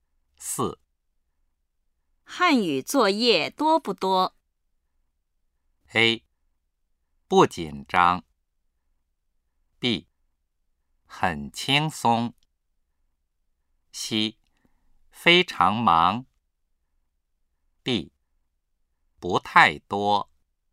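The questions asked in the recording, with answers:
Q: 汉语作业多不多?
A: D: 不太多。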